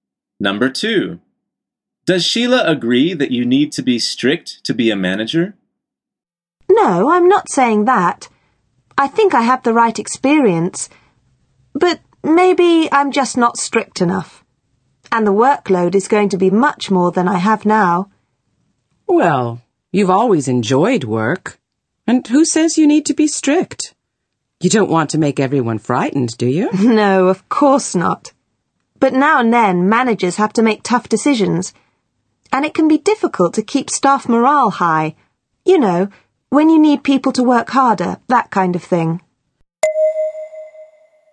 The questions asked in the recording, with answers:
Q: Does Sheila agree that you need to be strict to be a manager?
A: The answer is no.